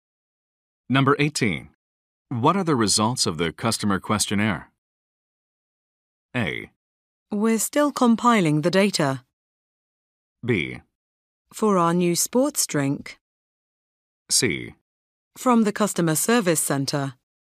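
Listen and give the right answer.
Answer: A: We're still compiling the data.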